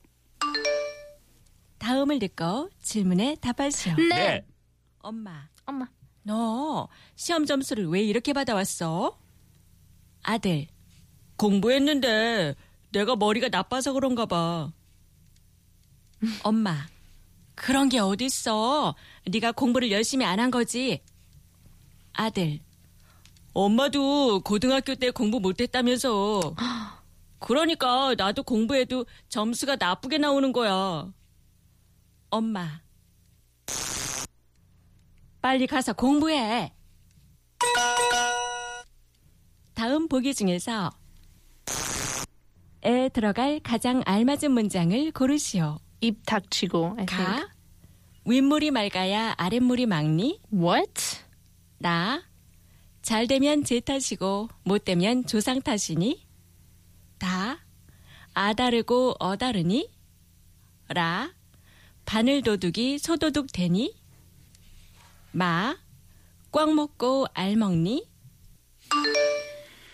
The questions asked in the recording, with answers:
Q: 다음 보기 중에서 에 들어갈 가장 알맞은 문장을 고르시오.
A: 나 잘 되면 제 탓이고 못 되면 제 탓이니 빨리 가서 공부해.